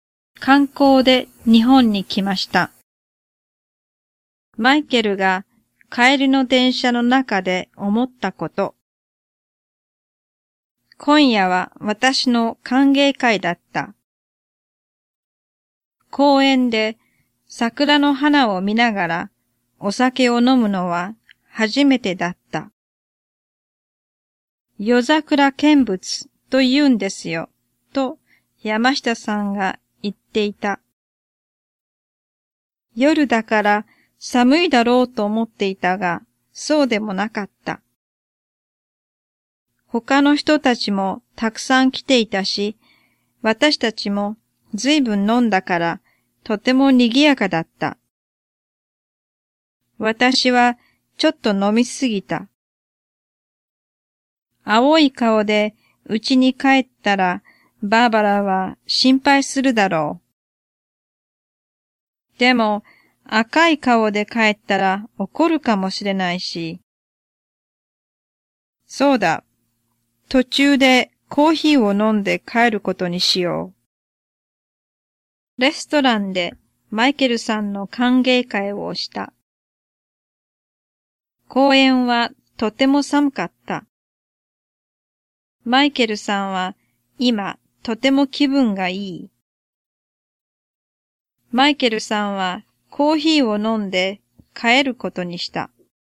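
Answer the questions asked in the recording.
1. 正しくない(公園で)
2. 正しくない
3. 正しくない(飲みすぎた)
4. 正しい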